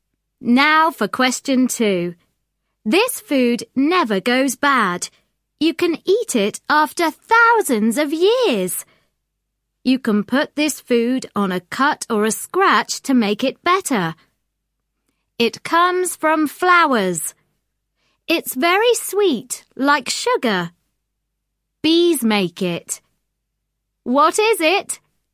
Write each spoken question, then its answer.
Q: What is it?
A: It's honey.